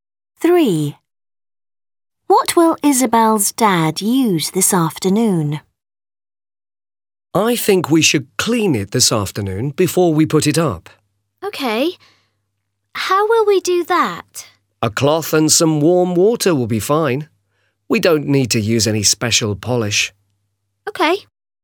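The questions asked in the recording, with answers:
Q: What will Isabel's dad use this afternoon?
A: a cloth and some warm water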